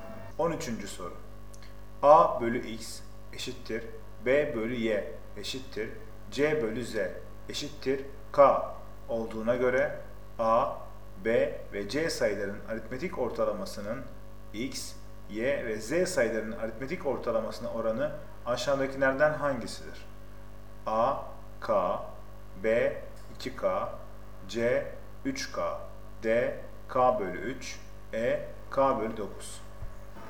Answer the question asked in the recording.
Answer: Doğru cevap A, K.